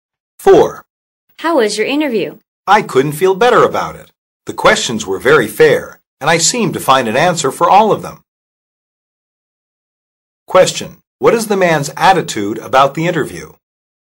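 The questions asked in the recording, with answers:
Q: What is the man's attitude about the interview?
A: Confident and pleased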